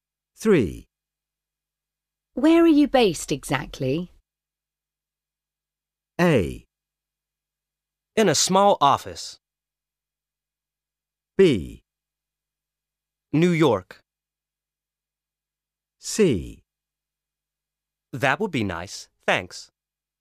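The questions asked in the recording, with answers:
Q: Where are you based exactly?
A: B: New York.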